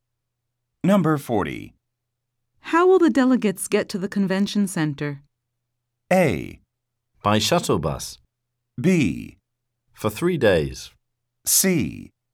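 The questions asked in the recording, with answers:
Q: How will the delegates get to the convention center?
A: A: By shuttle bus.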